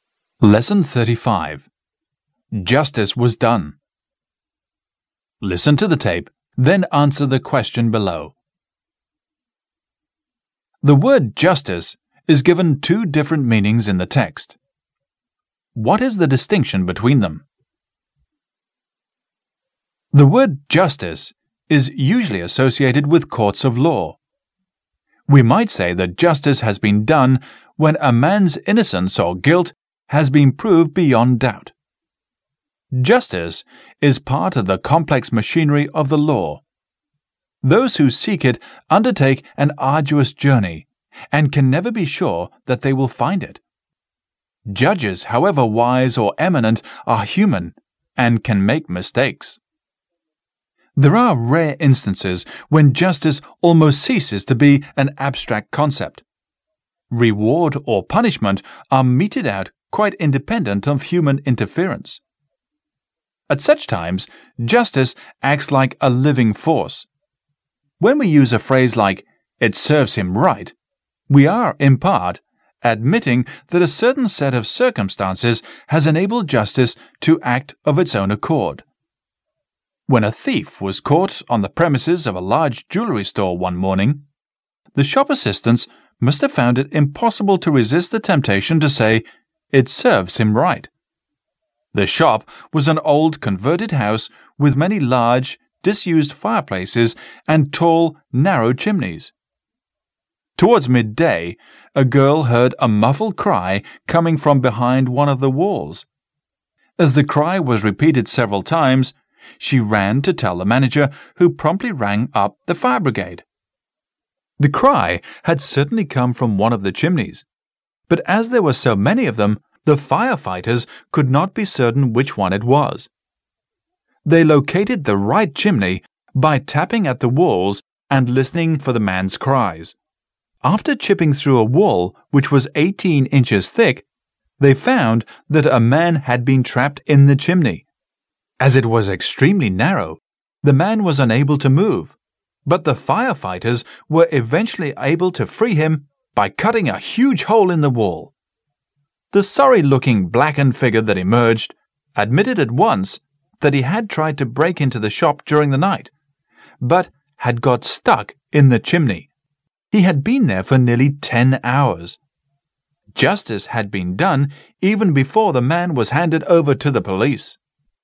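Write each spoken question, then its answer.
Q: The word justice is given two different meanings in the text. What is the distinction between them?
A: Justice in courts of law, decided by humans, versus justice acting of its own accord, independent of human interference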